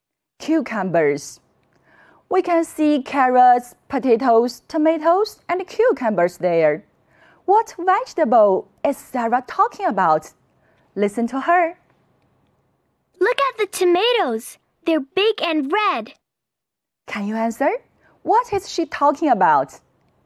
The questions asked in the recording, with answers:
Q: What vegetable is Sarah talking about?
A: Sarah is talking about tomatoes.